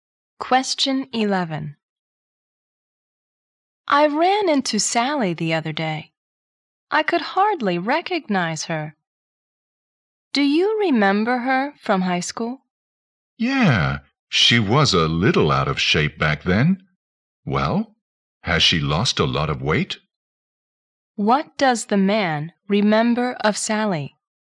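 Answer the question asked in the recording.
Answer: She was a little overweight (out of shape) in high school.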